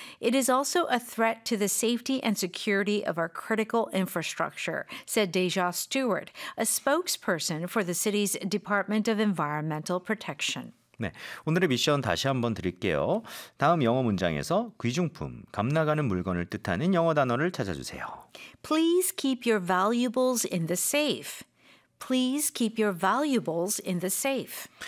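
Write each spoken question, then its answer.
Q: 다음 영어 문장에서 귀중품, 값나가는 물건을 뜻하는 영어 단어를 찾아주세요.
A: valuables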